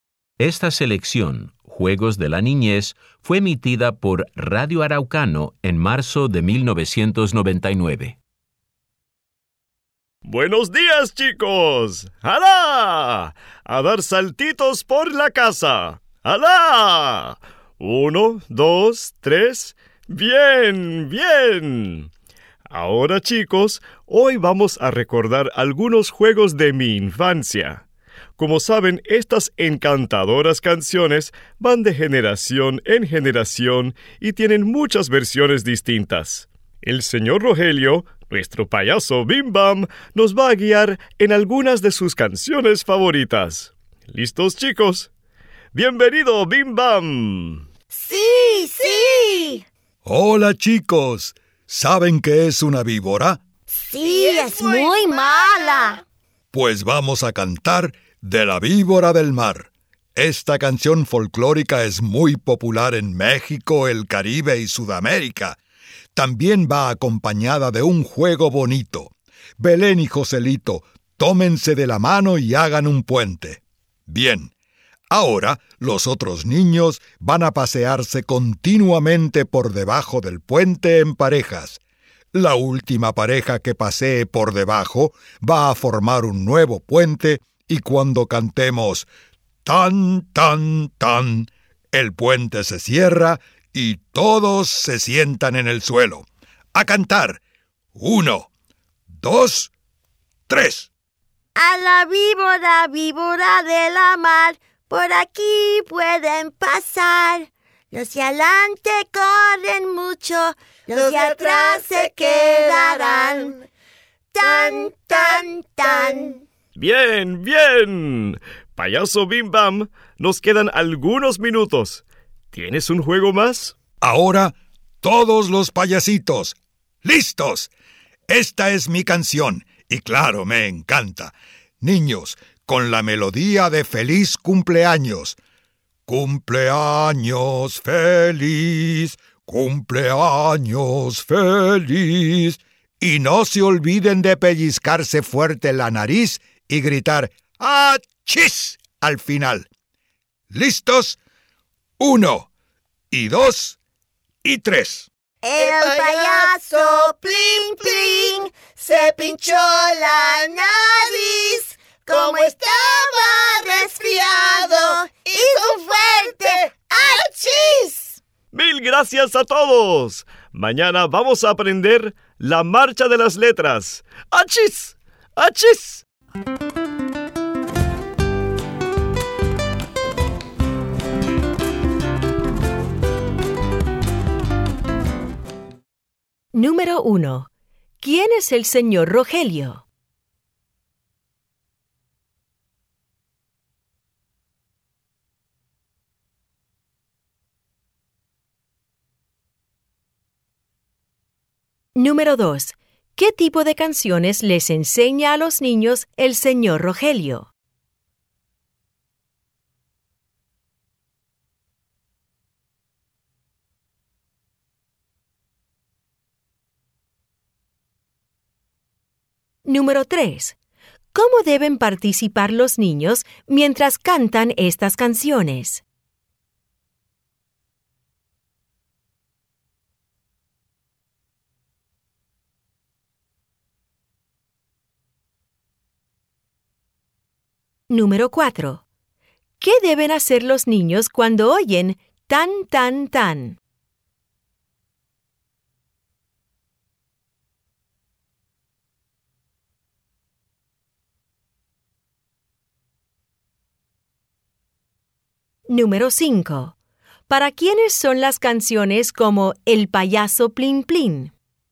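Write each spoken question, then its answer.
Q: ¿Quién es el señor Rogelio?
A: El payaso Bim Bam

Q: ¿Qué tipo de canciones les enseña a los niños el señor Rogelio?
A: Canciones folclóricas de la infancia, que pasan de generación en generación

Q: ¿Qué deben hacer los niños cuando oyen tan, tan, tan?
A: Sentarse en el suelo mientras el puente se cierra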